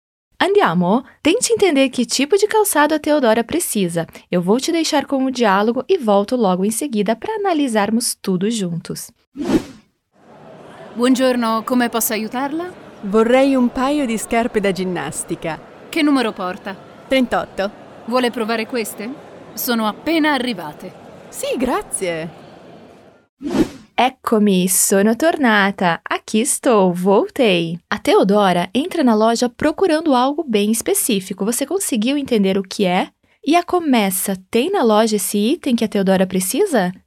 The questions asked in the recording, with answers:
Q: Você conseguiu entender o que é?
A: A Teodora fala para Comessa que gostaria de um par de tênis.